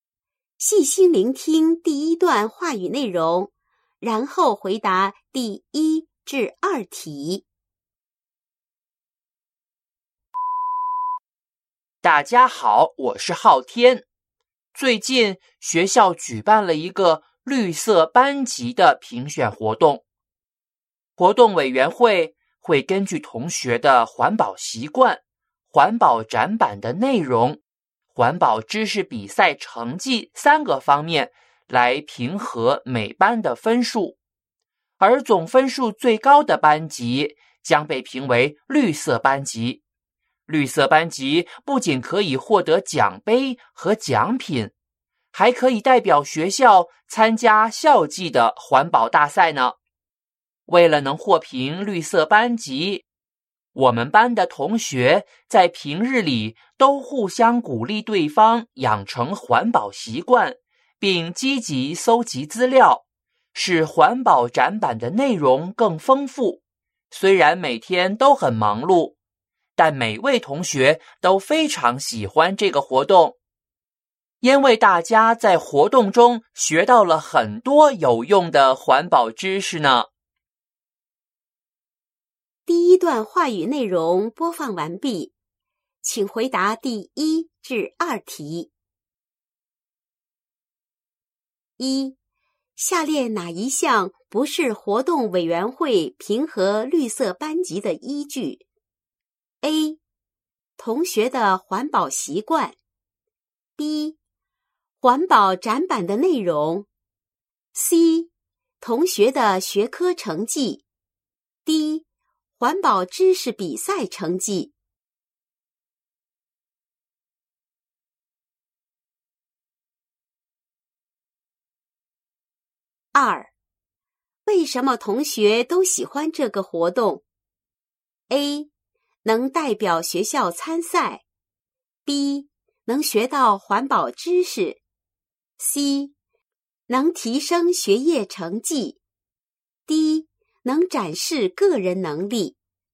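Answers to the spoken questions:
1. C: 同学的学科成绩。
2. B: 能学到环保知识。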